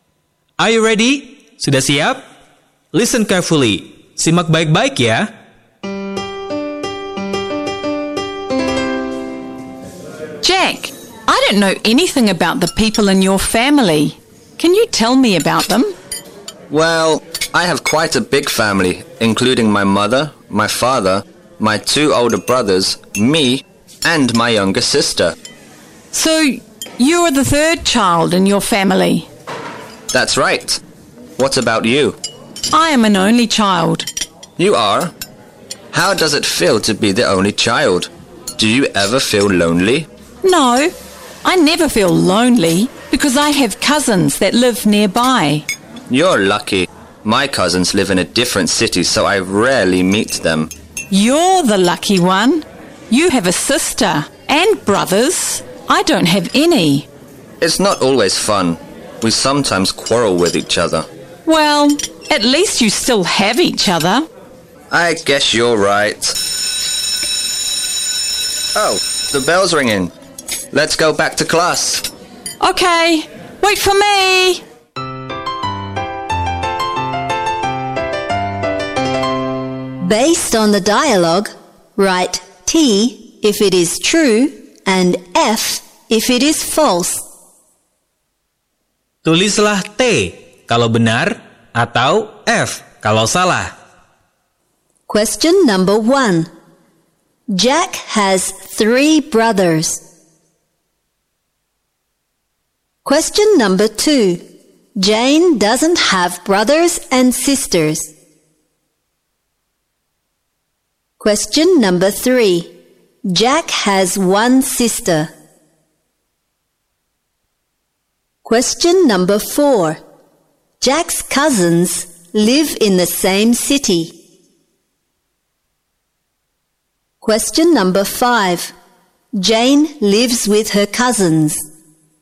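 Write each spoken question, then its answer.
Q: Jack has 3 brothers.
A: False atau F.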